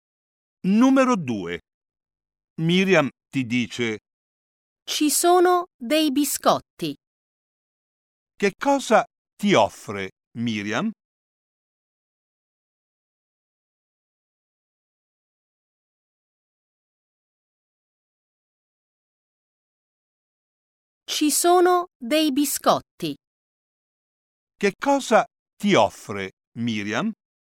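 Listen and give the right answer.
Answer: Dei biscotti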